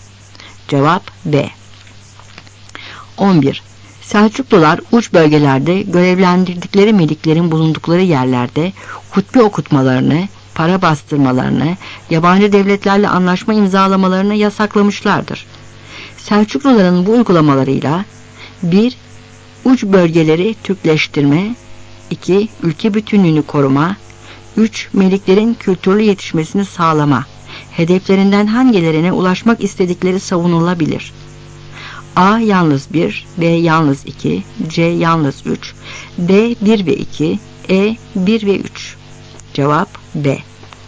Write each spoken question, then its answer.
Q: hedeflerinden hangilerine ulaşmak istedikleri savunulabilir?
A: Cevap B.